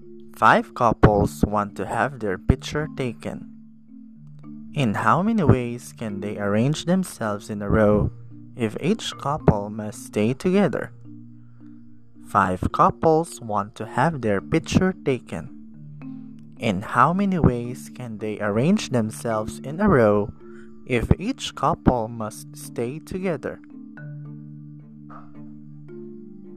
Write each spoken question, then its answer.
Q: In how many ways can they arrange themselves in a row if each couple must stay together?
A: 3,840, you are correct.